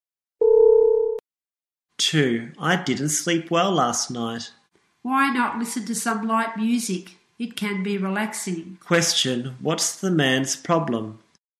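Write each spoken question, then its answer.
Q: Question, what's the man's problem?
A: He didn't sleep well last night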